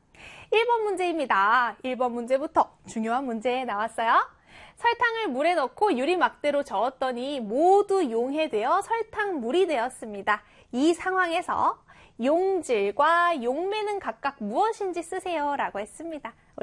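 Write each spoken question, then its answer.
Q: 이 상황에서 용질과 용매는 각각 무엇인지 쓰세요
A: 용질: 설탕, 용매: 물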